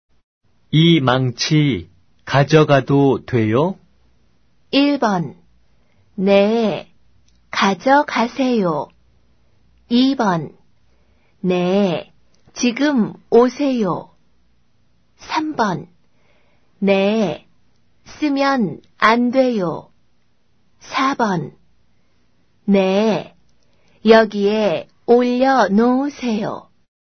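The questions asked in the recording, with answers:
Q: 이 망치 가져가도 돼요?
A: 1: 네, 가져가세요.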